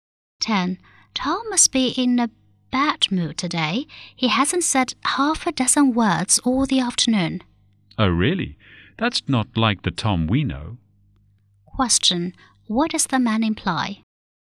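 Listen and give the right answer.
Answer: Tom is usually talkative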